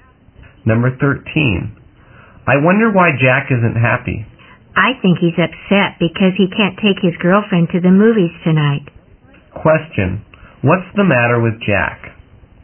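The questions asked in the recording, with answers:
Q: What's the matter with Jack?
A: He can't take his girlfriend to the movies tonight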